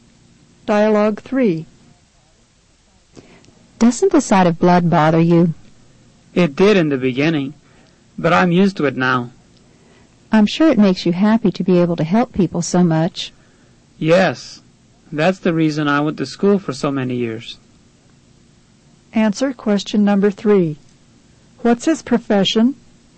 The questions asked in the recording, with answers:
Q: What's his profession?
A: Number 3 is C.